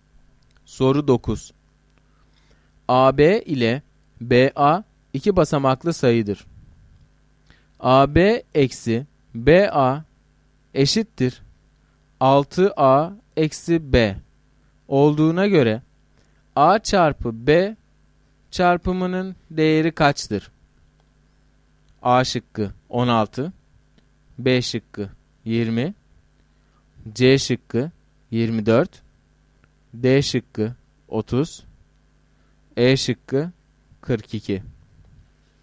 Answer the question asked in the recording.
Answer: Doğru cevap C şıkkı.